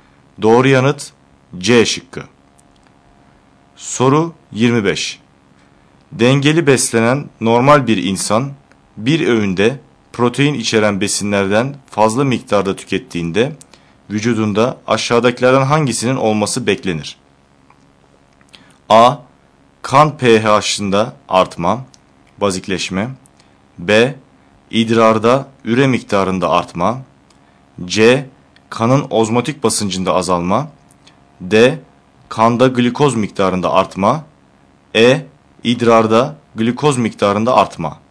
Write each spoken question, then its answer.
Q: Dengeli beslenen normal bir insan bir öğünde protein içeren besinlerden fazla miktarda tükettiğinde vücudunda aşağıdakilerden hangisinin olması beklenir?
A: Doğru yanıt B şıkkı.